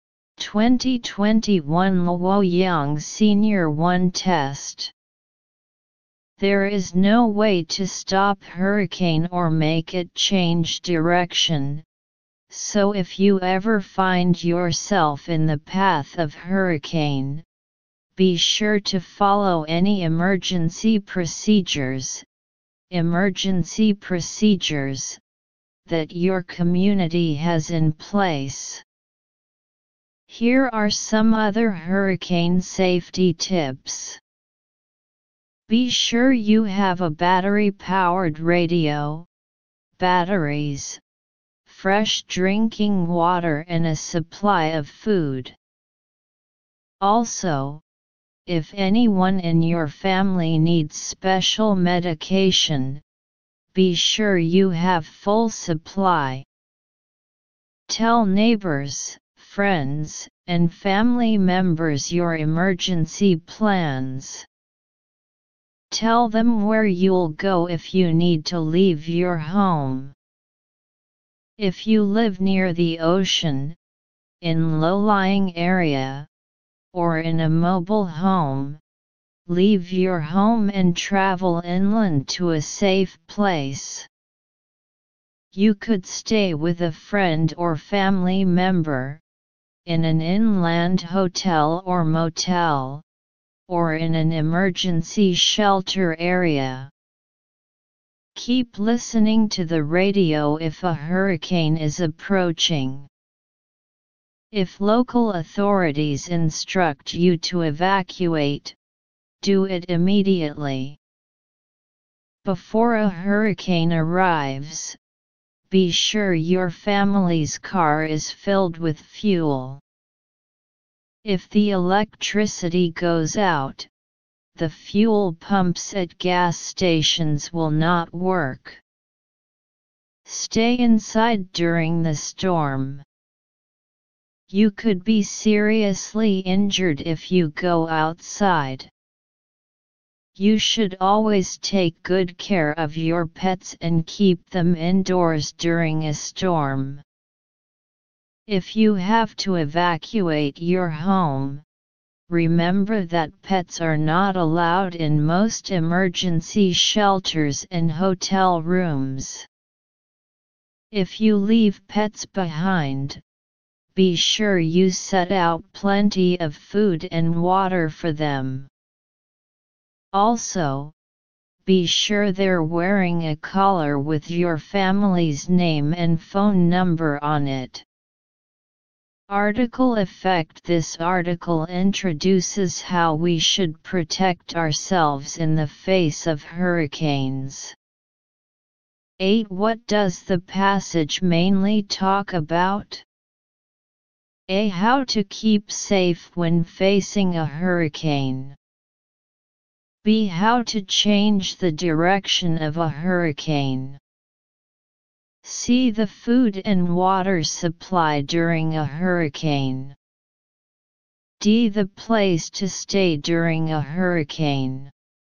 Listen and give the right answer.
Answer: So choose A.